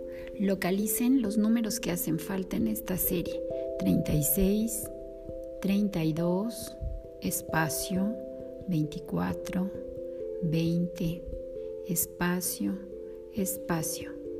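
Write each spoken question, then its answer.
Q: Localicen los números que hacen falta en esta serie.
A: 28, 16, 12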